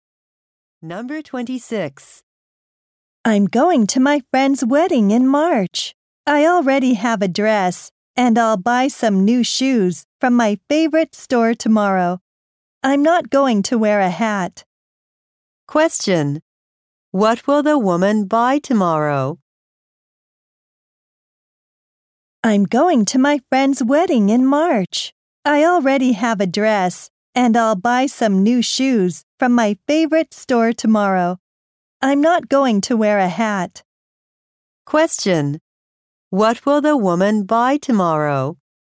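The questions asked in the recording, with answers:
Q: What will the woman buy tomorrow?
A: New shoes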